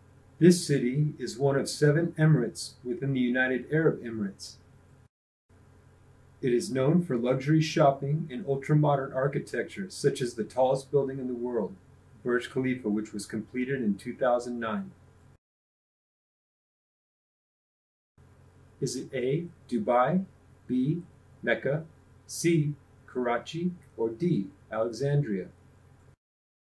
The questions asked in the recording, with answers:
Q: Is it A, Dubai, B, Mecca, C, Karachi, or D, Alexandria?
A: If you chose Dubai, you're correct.